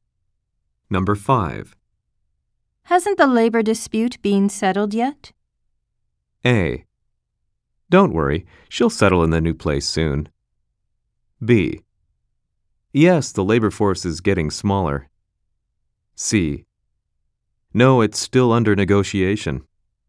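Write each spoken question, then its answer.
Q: Hasn't the labor dispute been settled yet?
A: C: No, it's still under negotiation.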